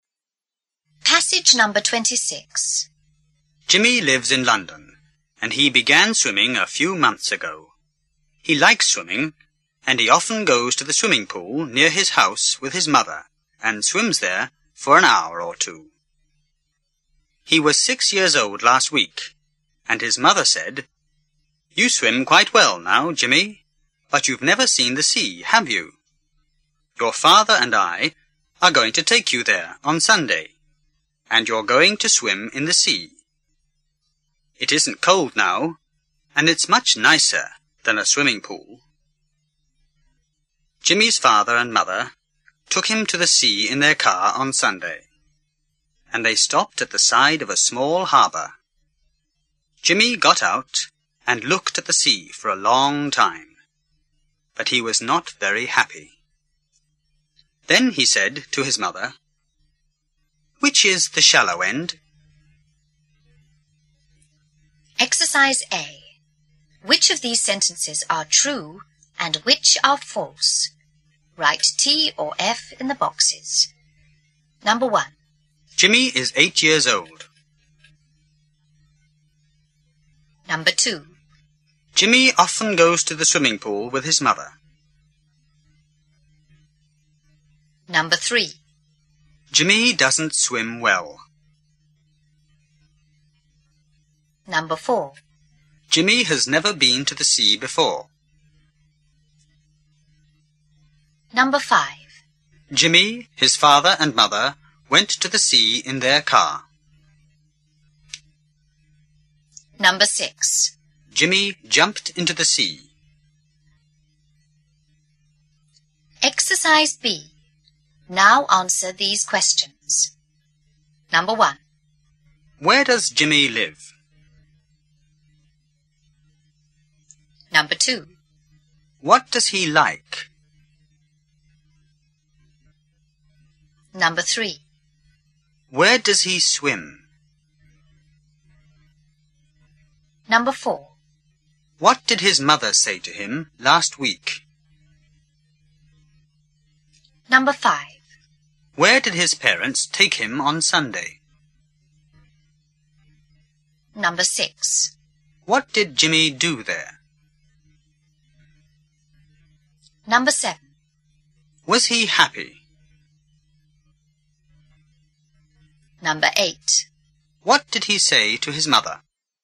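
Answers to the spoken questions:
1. False
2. True
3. False
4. True
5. True
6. False
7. In London
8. Swimming
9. In the swimming pool near his house
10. That he swims quite well now but has never seen the sea, and they would take him to swim in the sea on Sunday
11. To the sea
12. He got out and looked at the sea for a long time
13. No
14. "Which is the shallow end?"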